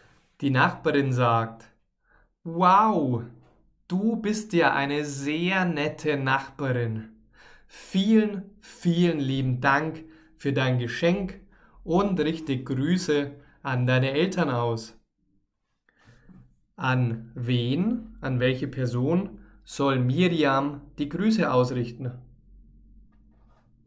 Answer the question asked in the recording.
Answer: an Miriams Eltern.